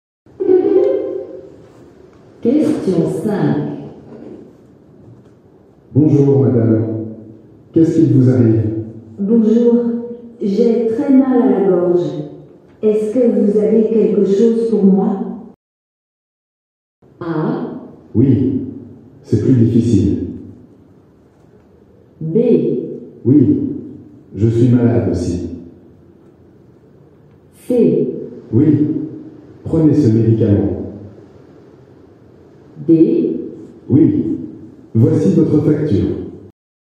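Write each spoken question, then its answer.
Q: Bonjour, madame. Qu'est-ce qui vous arrive? Bonjour. J'ai très mal à la gorge. Est-ce que vous avez quelque chose pour moi?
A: C: Oui, prenez ce médicament.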